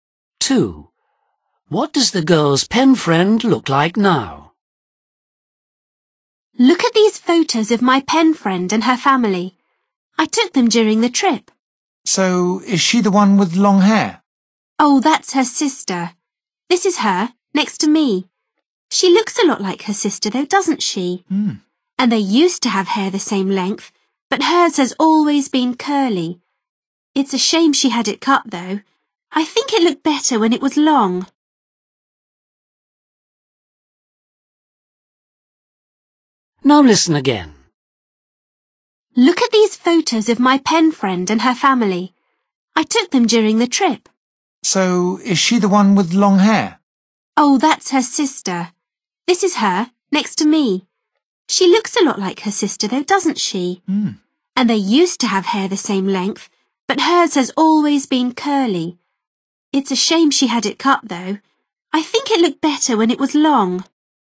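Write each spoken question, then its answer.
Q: What does the girl's pen friend look like now?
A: short curly hair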